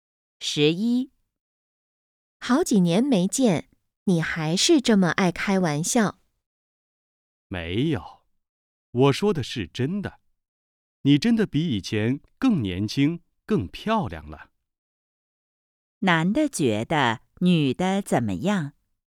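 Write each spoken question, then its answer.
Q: 男的觉得女的怎么样?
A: 比以前更年轻、更漂亮了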